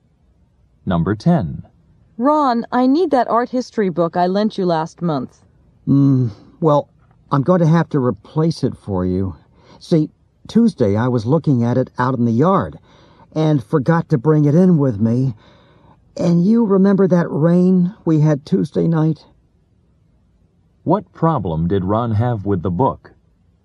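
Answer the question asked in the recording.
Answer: He left it outside and it got ruined by the rain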